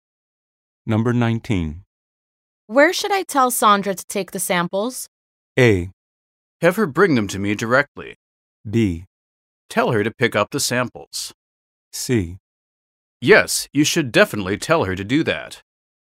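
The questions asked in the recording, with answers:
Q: Where should I tell Sandra to take the samples?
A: A: Have her bring them to me directly.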